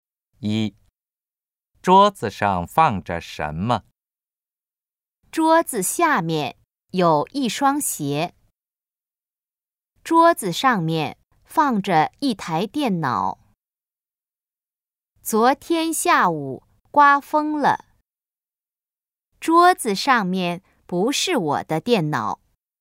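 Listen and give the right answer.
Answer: B: 桌子上面放着一台电脑。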